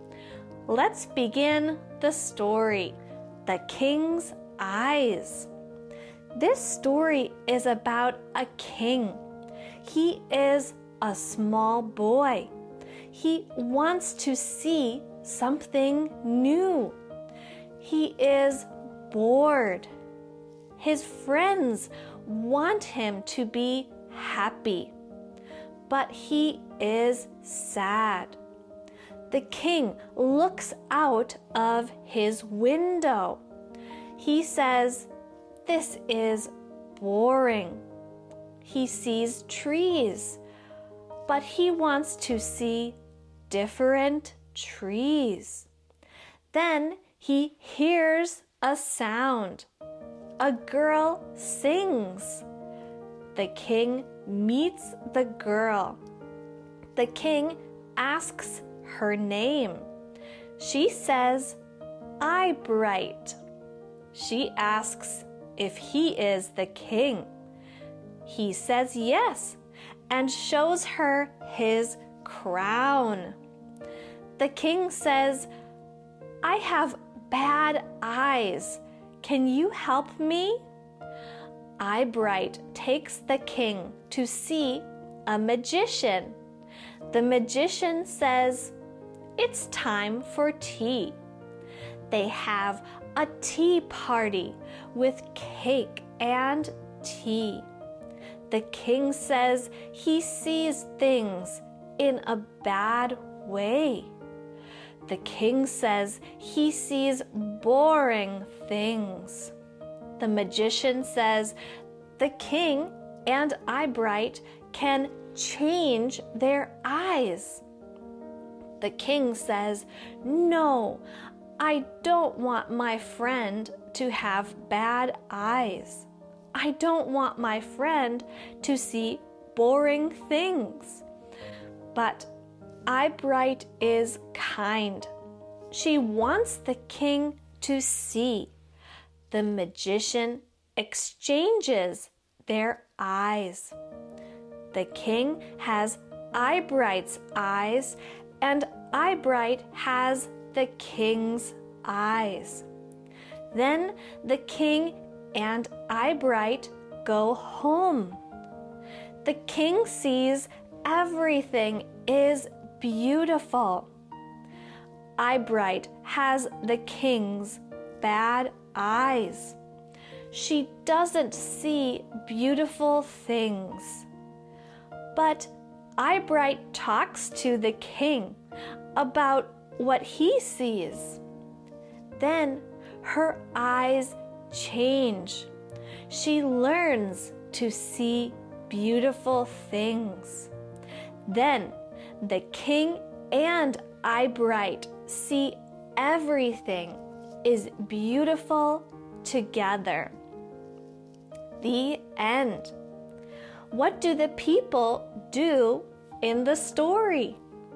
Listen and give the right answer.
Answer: 1. The king sees boring things. 2. The king meets the girl named Eyebright. 3. The magician has a tea party. 4. The king and Eyebright exchange eyes. 5. The king and Eyebright see beautiful things together.